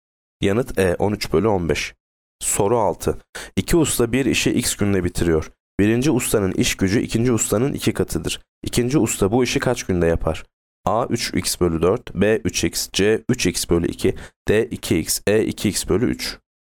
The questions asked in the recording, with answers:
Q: İkinci usta bu işi kaç günde yapar?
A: Yanıt B 3x.